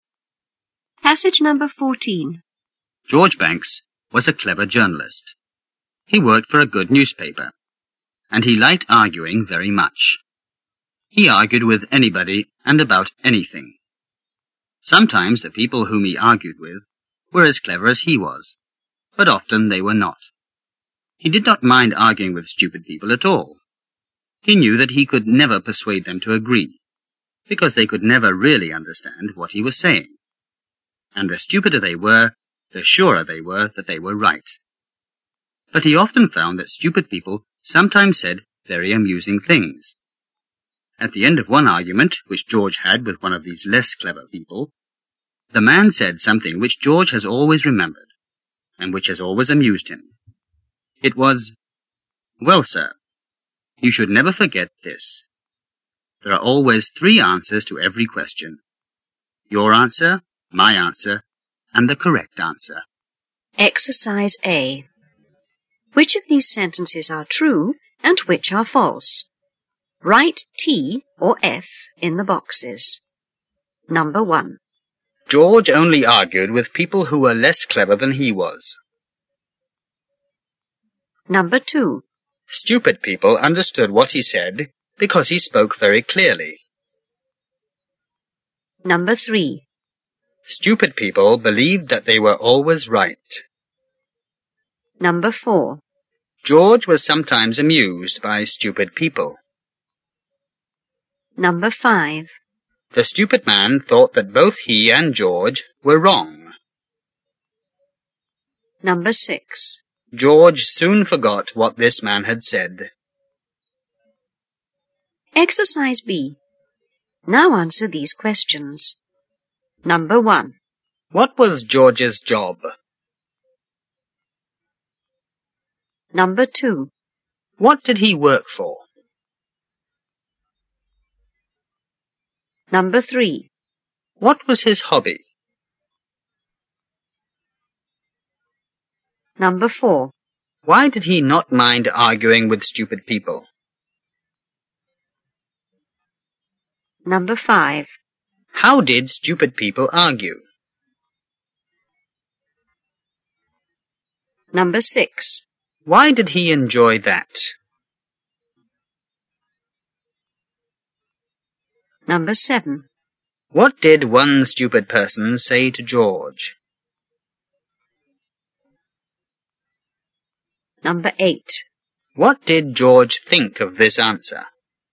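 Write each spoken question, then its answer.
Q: What was George's job?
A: He was a journalist.

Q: What did he work for?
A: A good newspaper.

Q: What was his hobby?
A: Arguing.

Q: What did one stupid person say to George?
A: There are always three answers to every question: your answer, my answer, and the correct answer.

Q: What did George think of this answer?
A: It amused him; he always remembered it.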